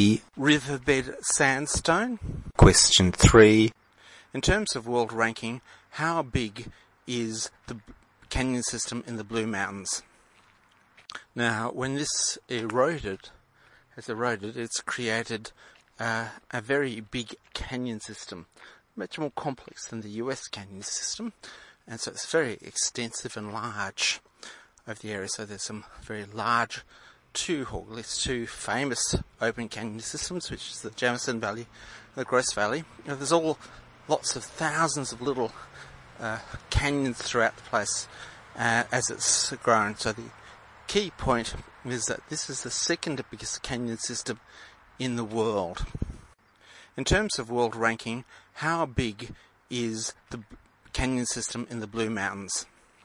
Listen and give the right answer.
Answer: C. It is the second biggest in the world.